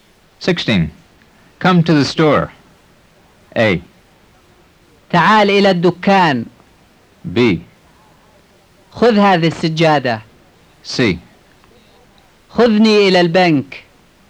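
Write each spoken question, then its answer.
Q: Come to the store.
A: A: تعال إلى الدكان.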